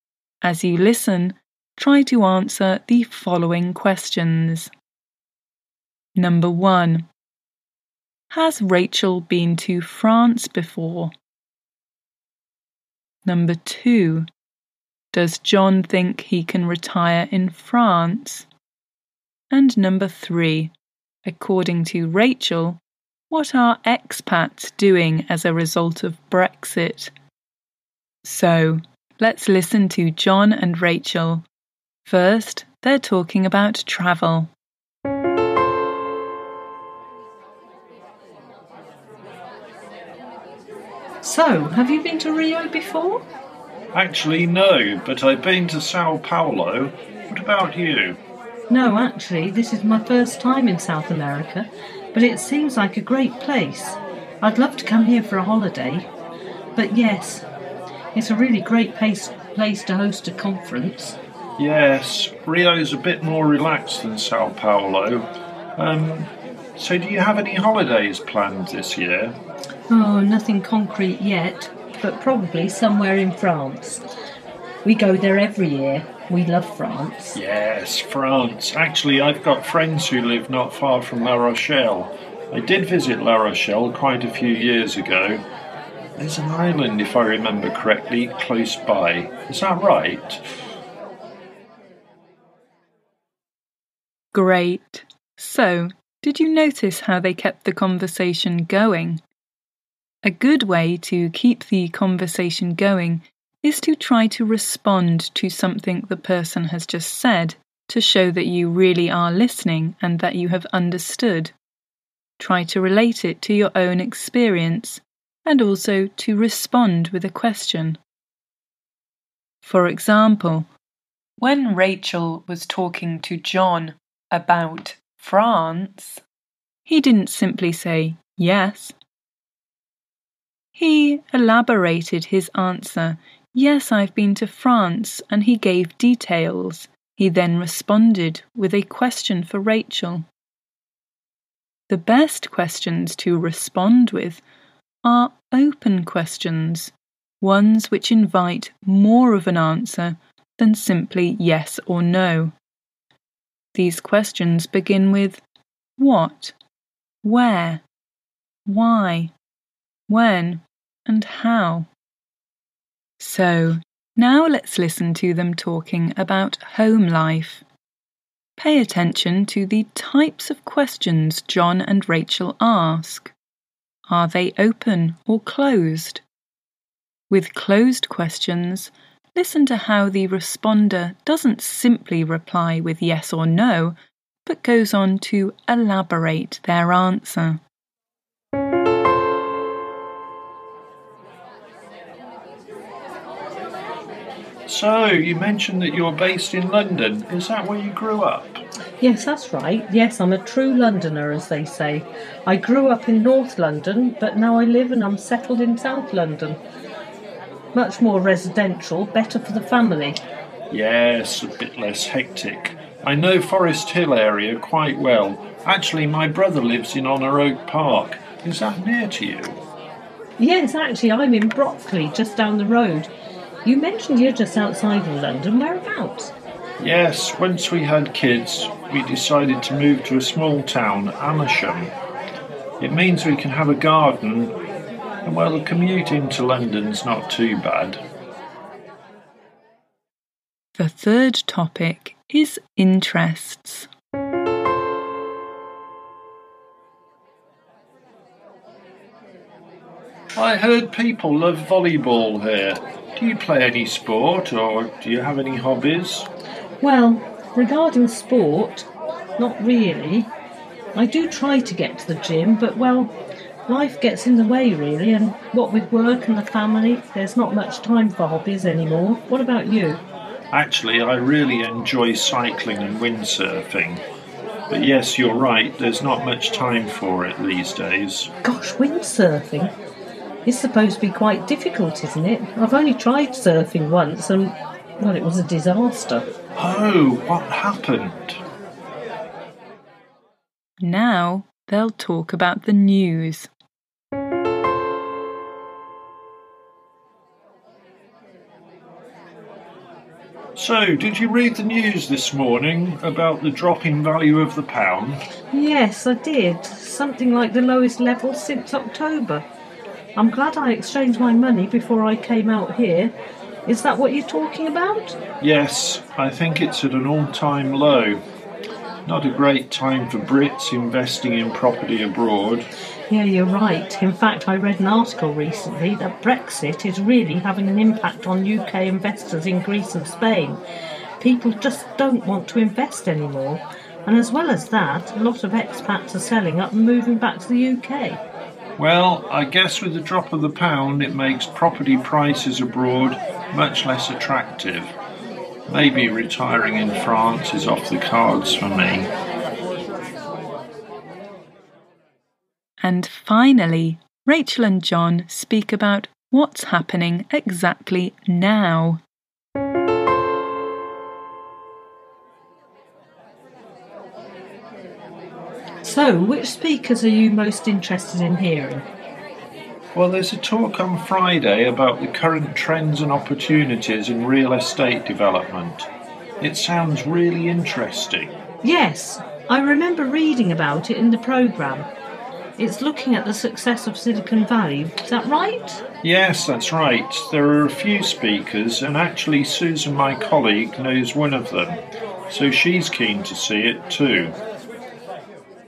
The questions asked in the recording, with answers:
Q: Has Rachel been to France before?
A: So yes, Rachel has been to France before.

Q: Does John think he can retire in France?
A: So John doesn't think he'll retire in France.

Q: According to Rachel, what are expats doing as a result of Brexit?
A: So, expats are selling up, meaning selling their properties and leaving the countries to return to their native country.